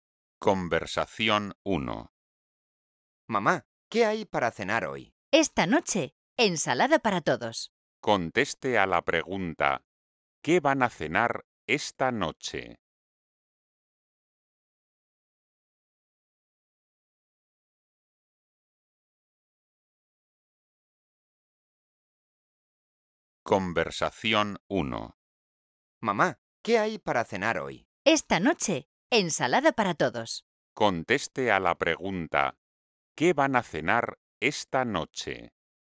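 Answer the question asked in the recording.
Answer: ensalada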